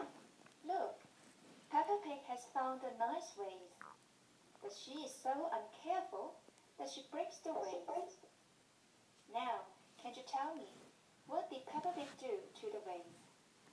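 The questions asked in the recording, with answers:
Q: Now, can you tell me, what did Peppa Pig do to the vase?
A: She broke the vase.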